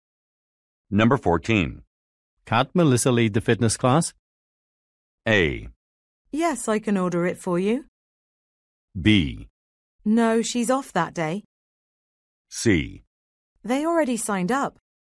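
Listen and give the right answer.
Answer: B: No, she's off that day.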